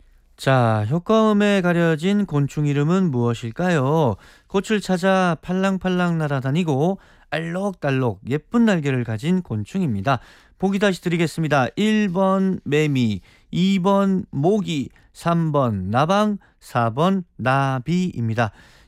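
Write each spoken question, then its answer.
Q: 자, 효과음에 가려진 곤충 이름은 무엇일까요?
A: 4: 나비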